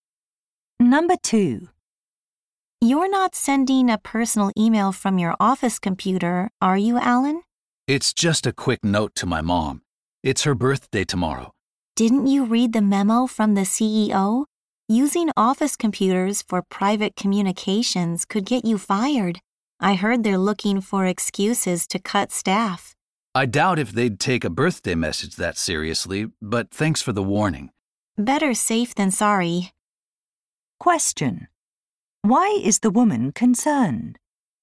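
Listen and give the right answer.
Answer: Alan could get fired for sending a personal email from an office computer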